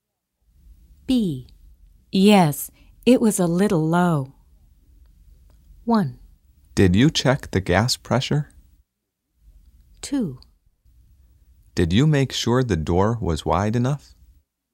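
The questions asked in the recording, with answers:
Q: Yes, it was a little low.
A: 1: Did you check the gas pressure?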